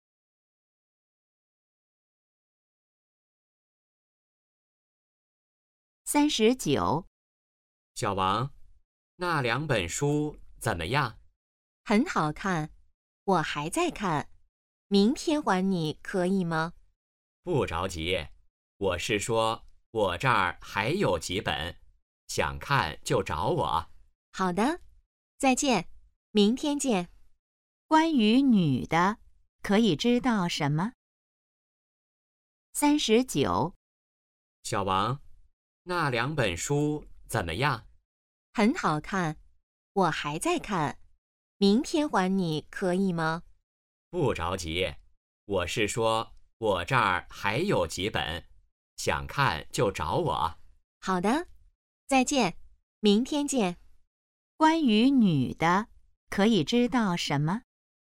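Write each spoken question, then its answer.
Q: 关于女的,可以知道什么?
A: 书还没看完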